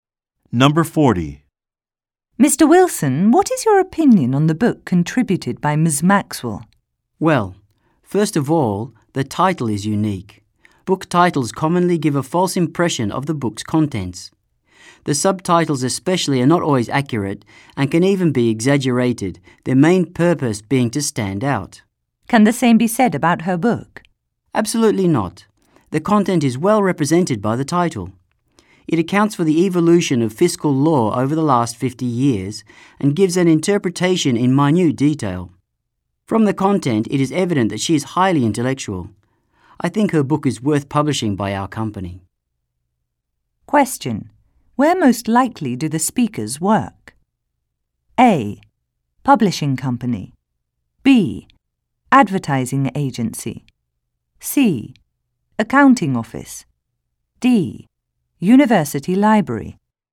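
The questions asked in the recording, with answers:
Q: Where most likely do the speakers work?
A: A: Publishing company.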